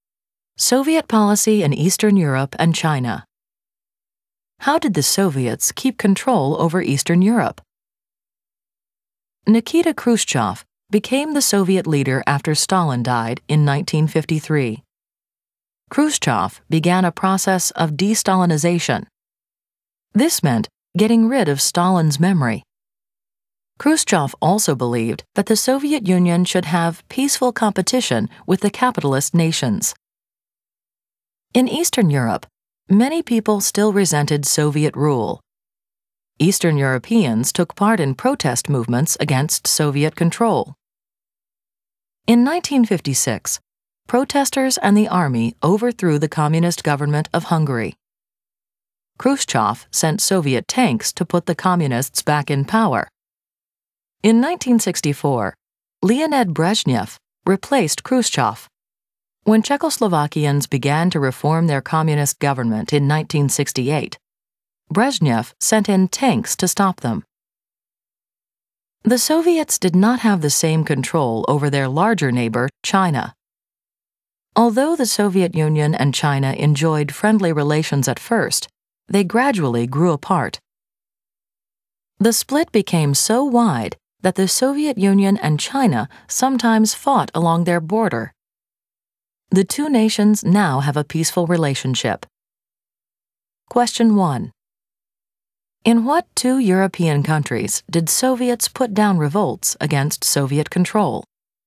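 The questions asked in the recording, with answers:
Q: In what two European countries did Soviets put down revolts against Soviet control?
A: Hungary and Czechoslovakia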